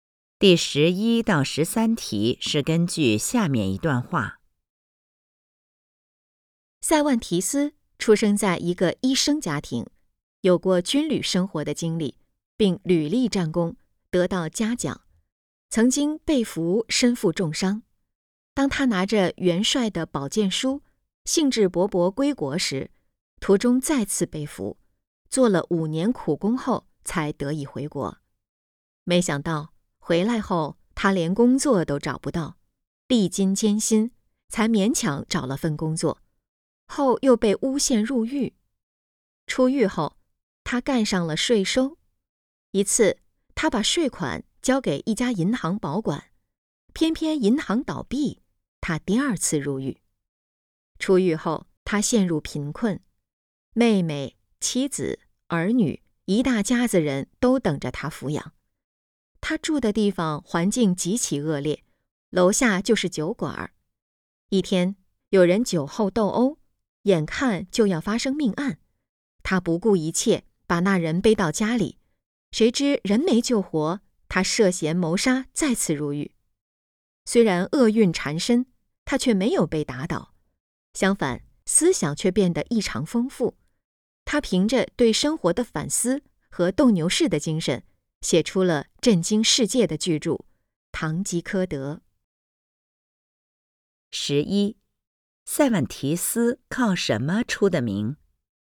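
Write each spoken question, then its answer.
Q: 塞万提斯靠什么出的名?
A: 写出了巨著《堂吉诃德》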